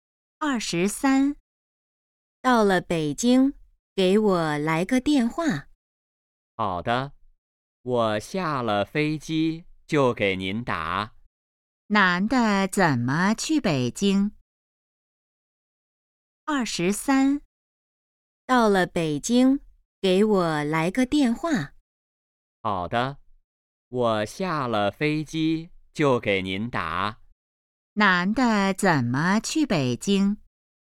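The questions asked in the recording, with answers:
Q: 男的怎么去北京?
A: 坐飞机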